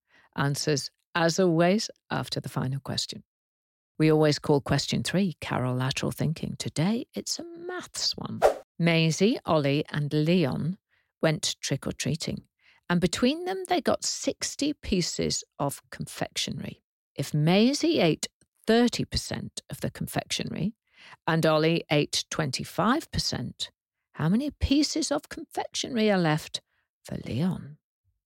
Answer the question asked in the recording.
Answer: The answer is 27 pieces, because Leon was left with 45% of the total, which was 60 pieces.